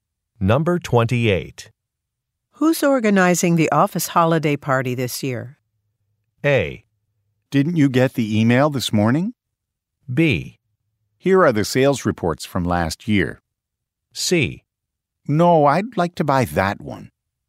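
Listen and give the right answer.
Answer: A: Didn't you get the email this morning?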